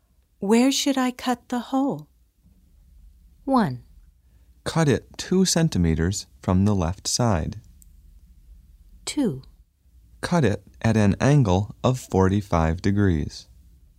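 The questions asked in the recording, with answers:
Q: Where should I cut the hole?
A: 1: Cut it 2 centimeters from the left side.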